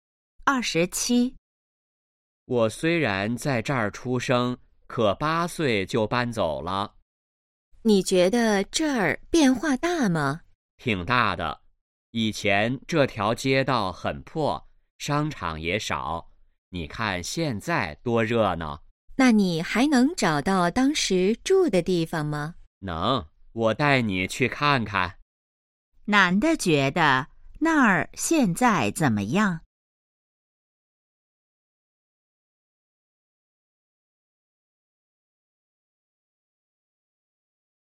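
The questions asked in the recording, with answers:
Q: 男的觉得那儿现在怎么样?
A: 很热闹,变化大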